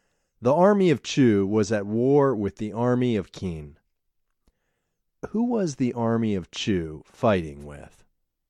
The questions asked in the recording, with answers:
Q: Who was the army of Chu fighting with?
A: The army of Chu was fighting with the army of Qin.